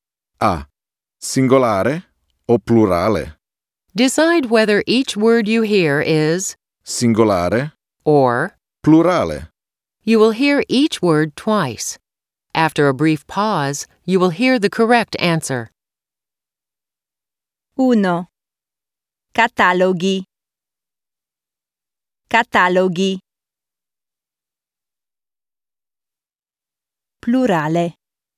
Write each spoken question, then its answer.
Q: Singolare o plurale?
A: Plurale.